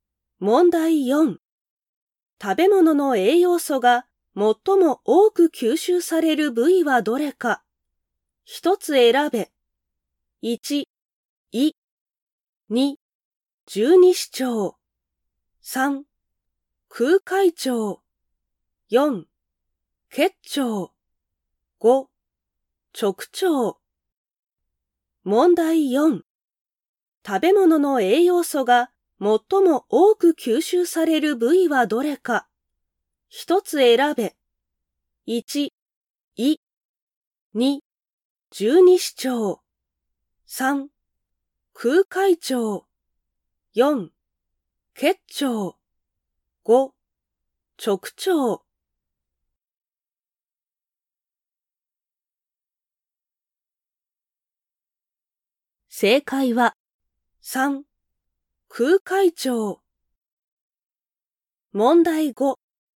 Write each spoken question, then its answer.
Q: 食べ物の栄養素が最も多く吸収される部位はどれか。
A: 正解は 3. 空海腸。